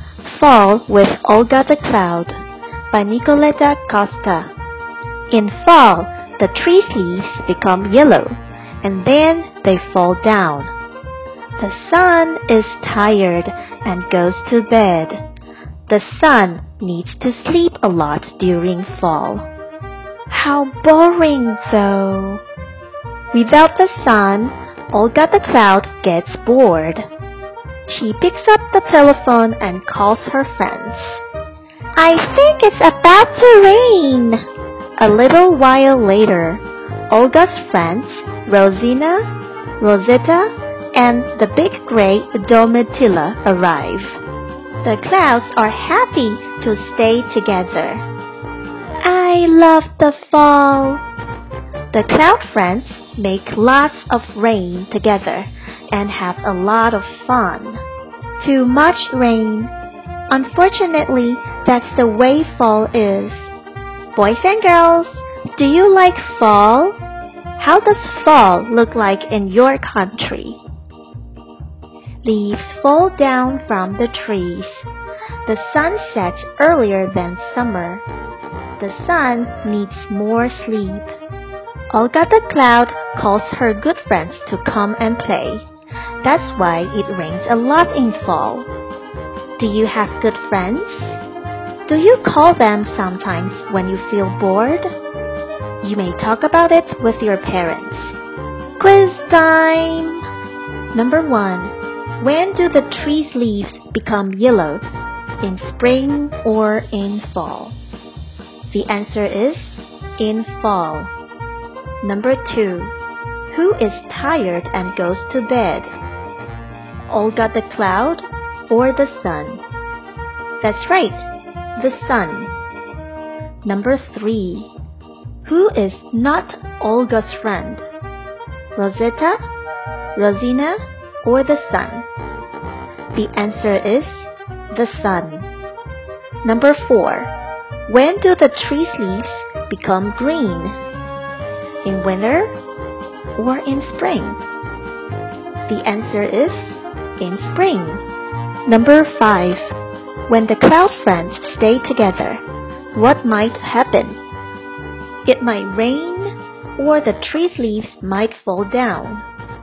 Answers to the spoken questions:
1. The answer is in fall.
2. That's right, the sun.
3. The answer is the sun.
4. The answer is in spring.
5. That's right. The answer is it might rain.